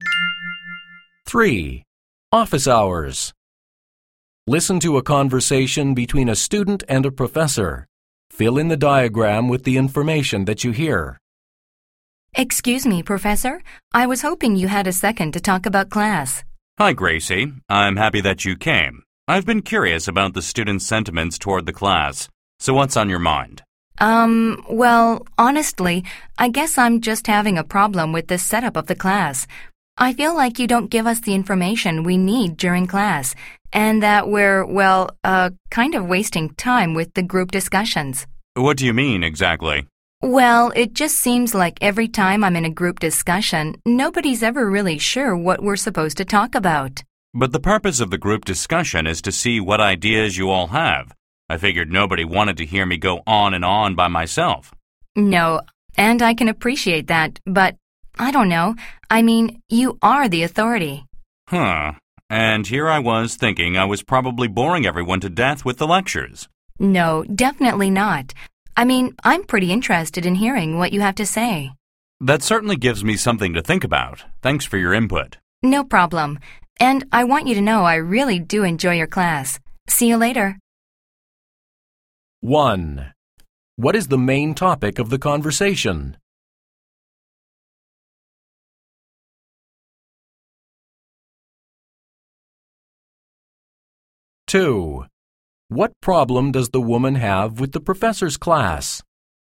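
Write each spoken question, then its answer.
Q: What is the main topic of the conversation?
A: The student's problem with how the class is set up

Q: What problem does the woman have with the professor's class?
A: She feels the professor doesn't give enough information in class and group discussions waste time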